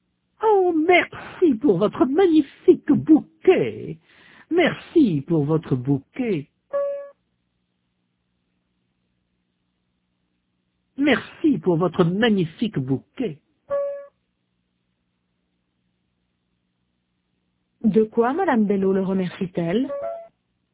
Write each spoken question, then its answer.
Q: De quoi Madame Bello le remercie-t-elle?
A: De son bouquet.